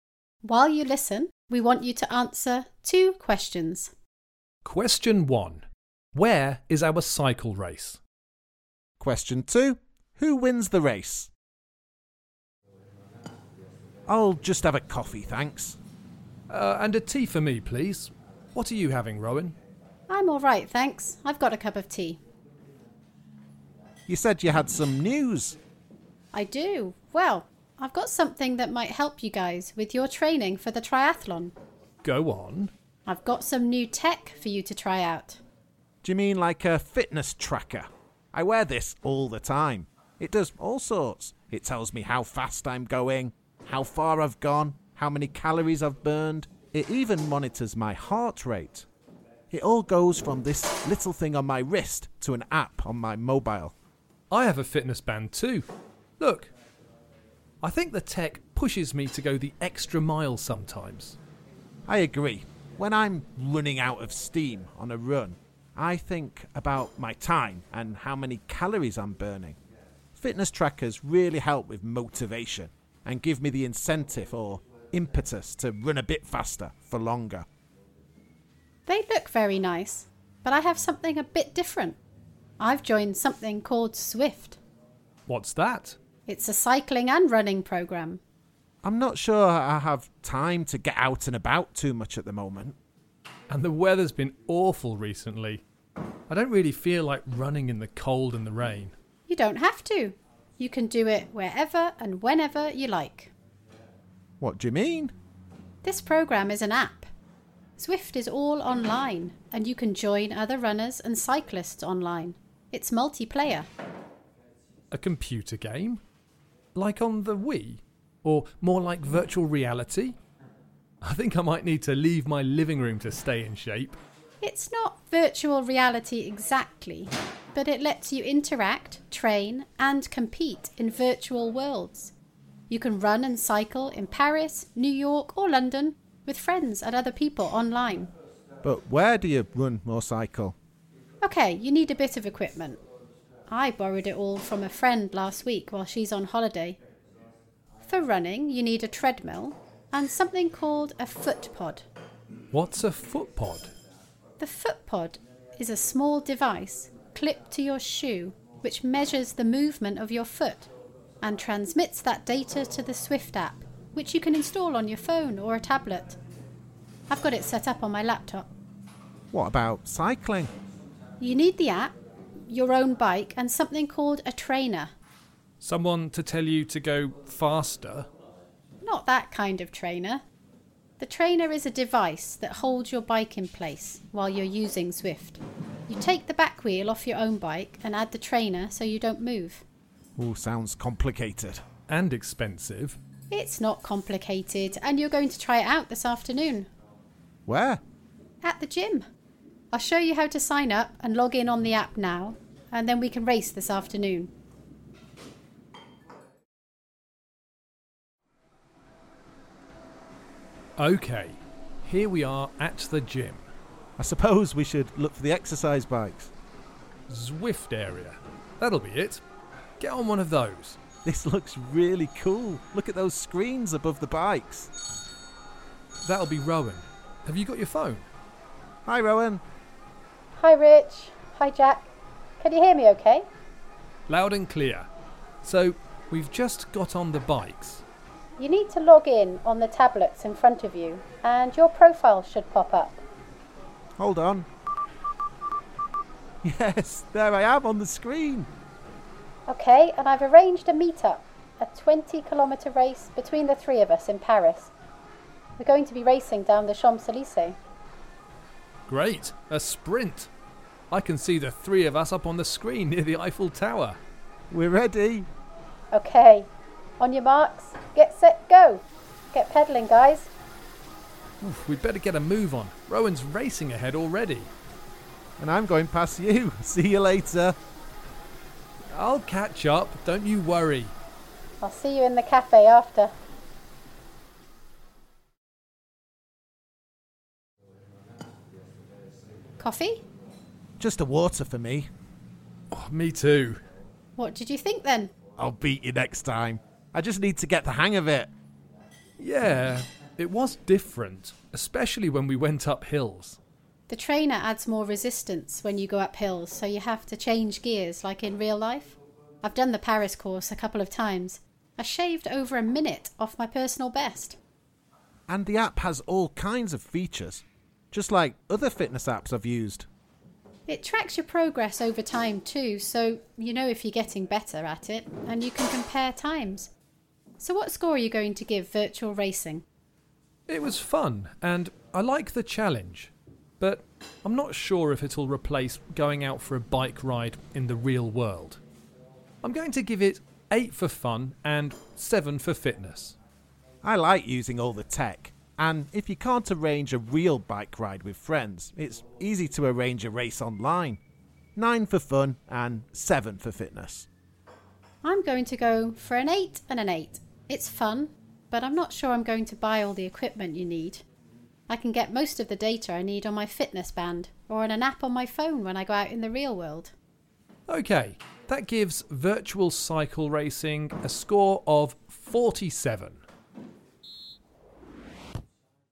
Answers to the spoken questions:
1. But the race took place online.
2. And I think Rowan has just given away the answer, because it was her.